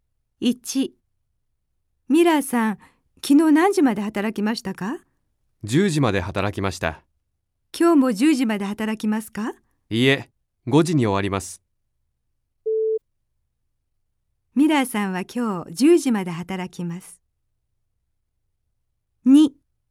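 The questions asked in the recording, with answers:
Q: ミラーさんは今日10時まで働きます。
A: ×(今日は5時に終わります)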